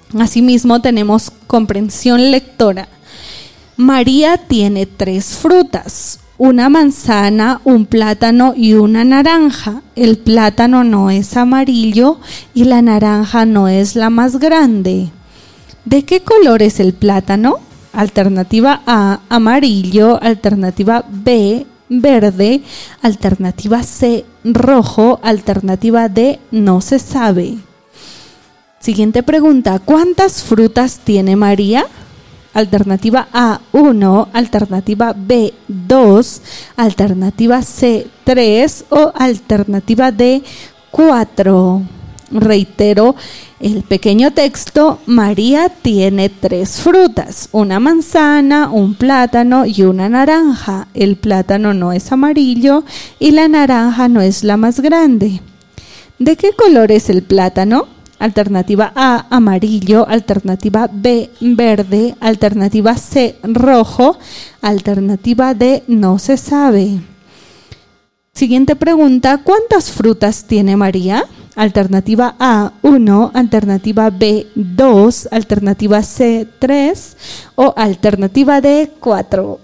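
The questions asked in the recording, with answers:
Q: ¿cuántas frutas tiene María?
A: C: 3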